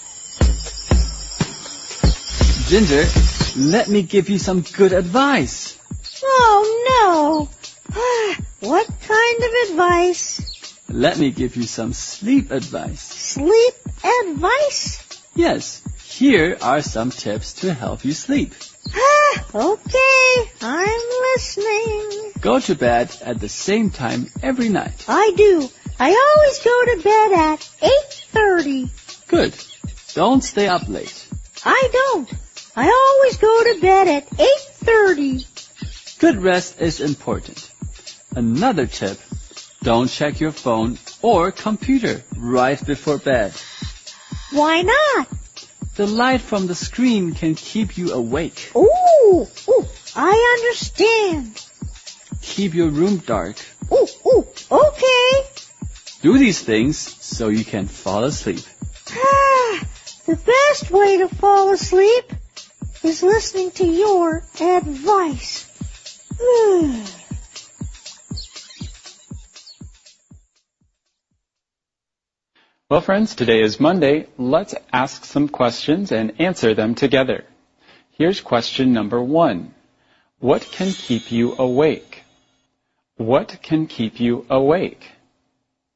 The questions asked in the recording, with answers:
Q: What can keep you awake?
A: Light from the screens can keep you awake.